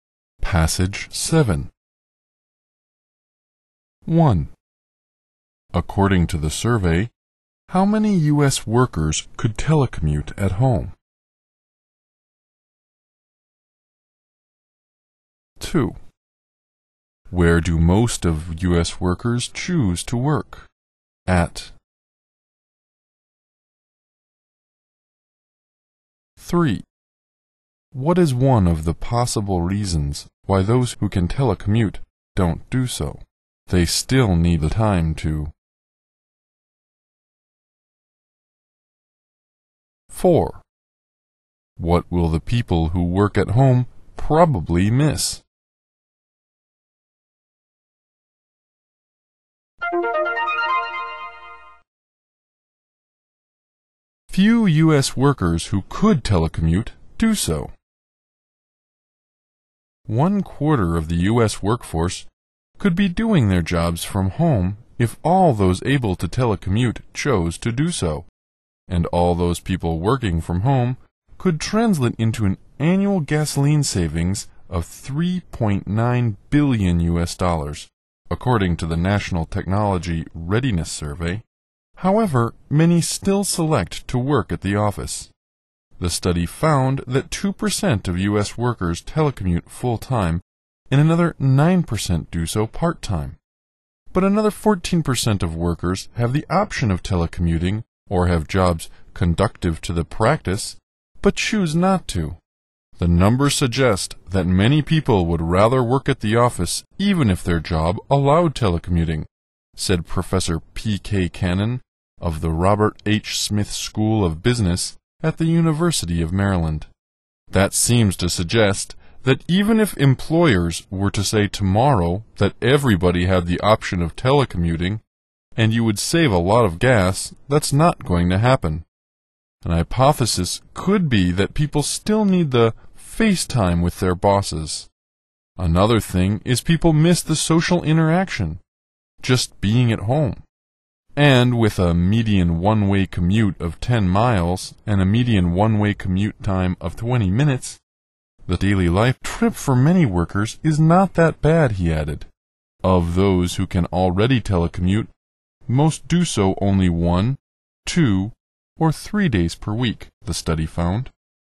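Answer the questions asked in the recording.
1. 1/4 of the U.S. workforce
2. At the office
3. They still need the FaceTime with their bosses
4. The social interaction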